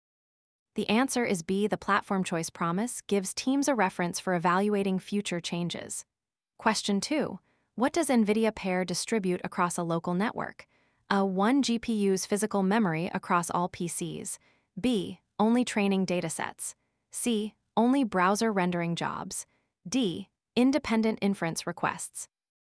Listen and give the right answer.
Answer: The answer is D.